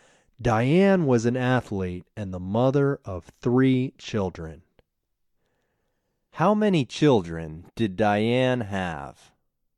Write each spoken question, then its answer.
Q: How many children did Diane have?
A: Diane had 3 children.